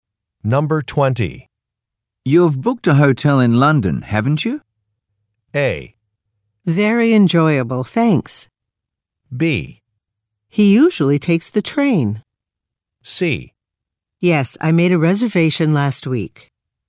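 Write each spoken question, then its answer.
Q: You've booked a hotel in London, haven't you?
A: C: Yes, I made a reservation last week.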